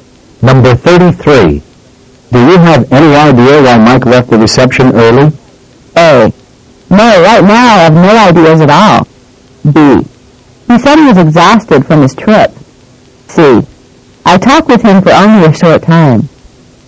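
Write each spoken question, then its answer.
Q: Do you have any idea why Mike left the reception early?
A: B: He said he was exhausted from his trip.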